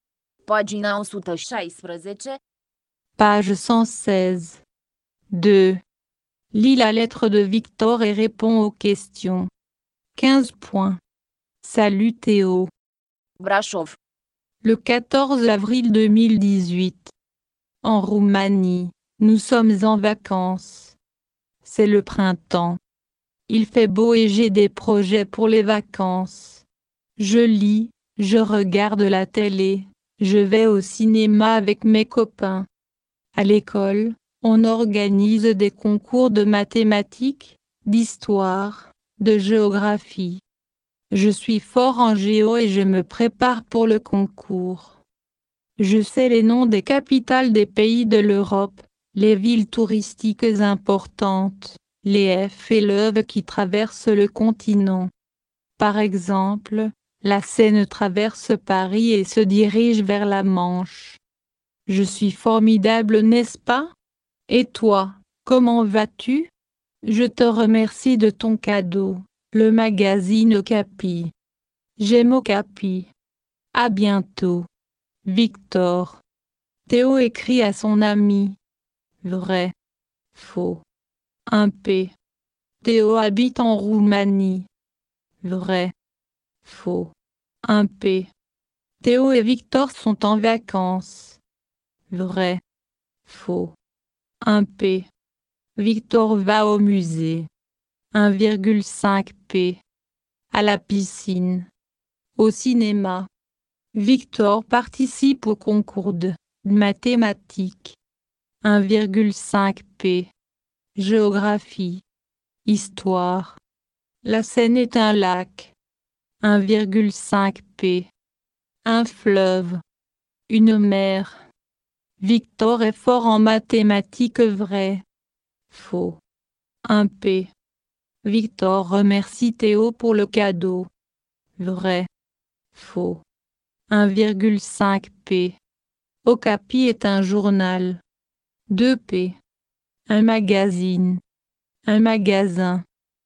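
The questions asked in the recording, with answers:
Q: Théo écrit à son ami.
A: Faux (c'est Victor qui écrit à Théo)

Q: Théo habite en Roumanie.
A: Faux (c'est Victor qui habite en Roumanie)

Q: Victor va au musée.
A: Faux: au cinéma

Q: Victor participe au concours de mathématiques.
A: Faux: géographie

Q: La Seine est un lac.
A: Faux: un fleuve

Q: Victor est fort en mathématiques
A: Faux

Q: Victor remercie Théo pour le cadeau.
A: Vrai

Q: Okapi est un journal.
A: Faux: un magazine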